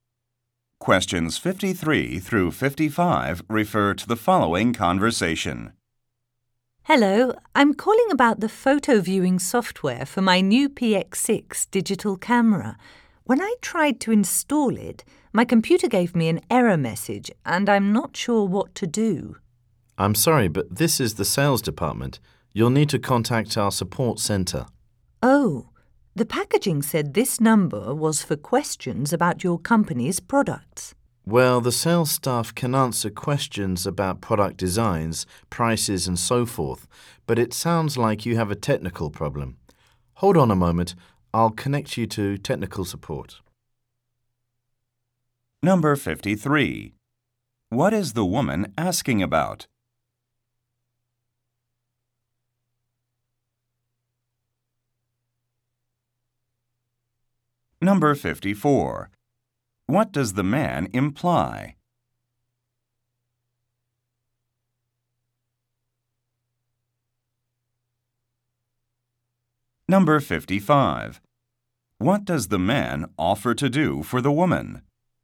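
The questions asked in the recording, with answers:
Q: What is the woman asking about?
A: Installing camera photo software

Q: What does the man imply?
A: She called the wrong department

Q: What does the man offer to do for the woman?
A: Connect her to technical support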